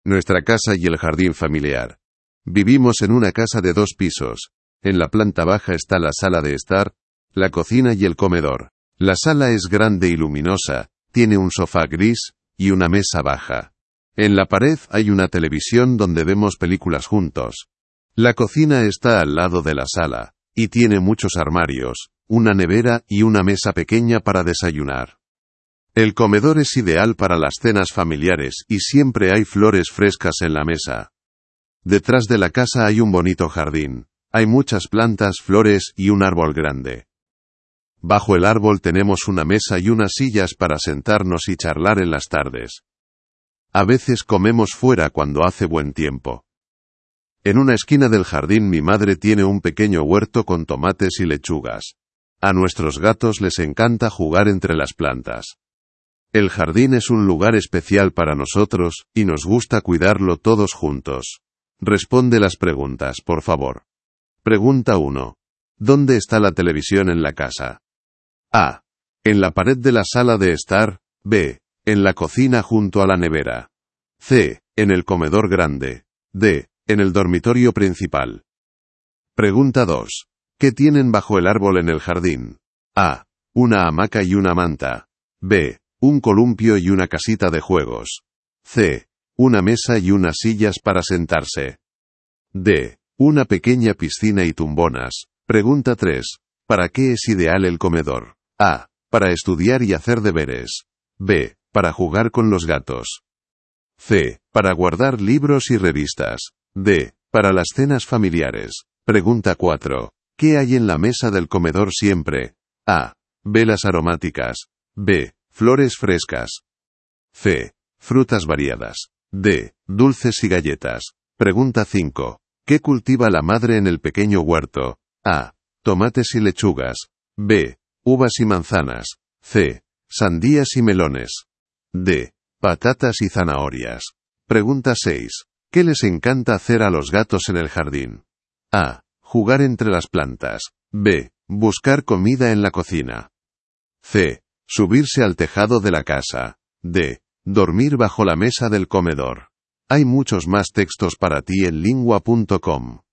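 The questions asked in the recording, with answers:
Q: ¿Dónde está la televisión en la casa?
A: A: En la pared de la sala de estar.

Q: ¿Qué tienen bajo el árbol en el jardín?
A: C: Una mesa y unas sillas para sentarse.

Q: ¿Para qué es ideal el comedor?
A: D: Para las cenas familiares.

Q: ¿Qué hay en la mesa del comedor siempre?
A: B: Flores frescas.

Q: ¿Qué cultiva la madre en el pequeño huerto?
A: A: Tomates y lechugas.

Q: ¿Qué les encanta hacer a los gatos en el jardín?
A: A: Jugar entre las plantas.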